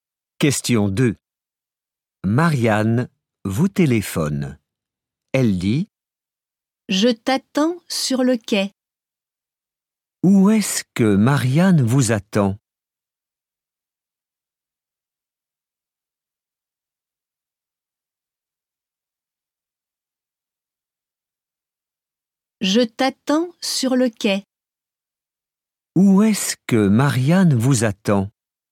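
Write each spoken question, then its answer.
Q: Où est-ce que Marianne vous attend ?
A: Sur le quai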